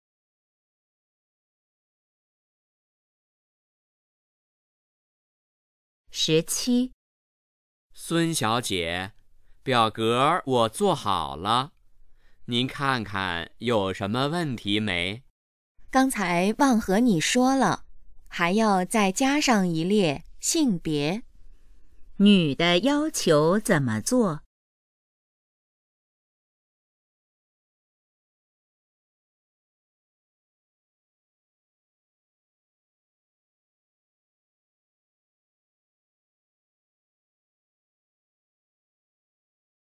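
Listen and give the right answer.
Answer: 在表格里加上一列性别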